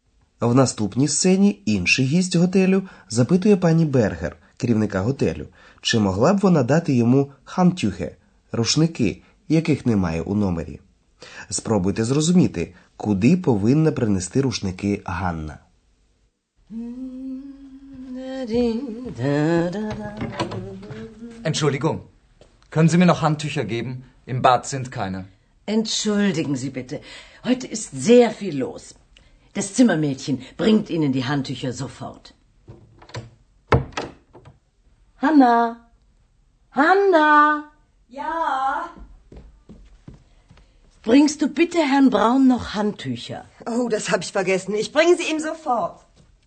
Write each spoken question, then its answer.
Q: Спробуйте зрозуміти, куди повинна принести рушники Ганна.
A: Ганна повинна віднести рушники в номер пана Брауна, бо їх там не було.